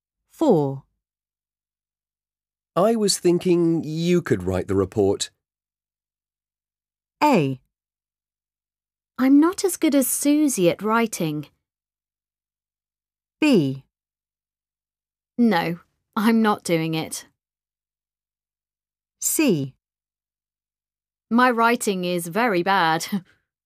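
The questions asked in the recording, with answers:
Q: I was thinking you could write the report.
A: A: I'm not as good as Susie at writing.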